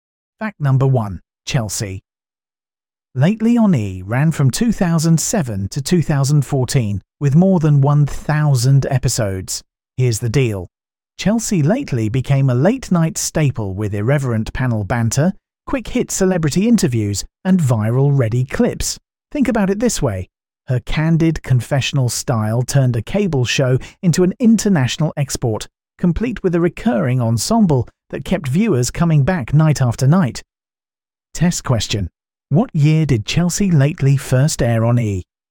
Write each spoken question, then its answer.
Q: What year did Chelsea Lately first air on E?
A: 2007